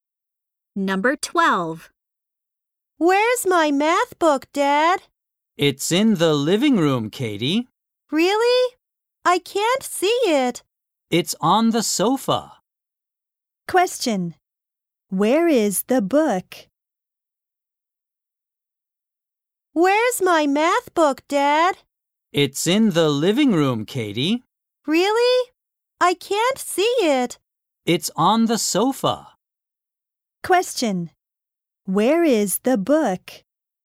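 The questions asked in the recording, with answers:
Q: Where is the book?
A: On the sofa in the living room.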